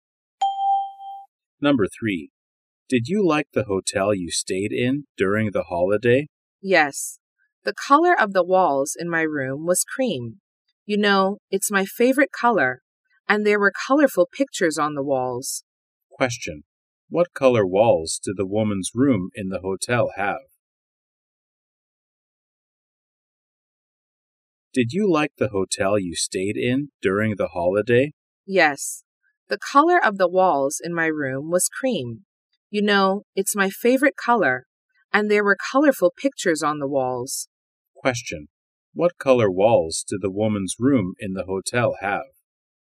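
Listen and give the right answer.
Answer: Cream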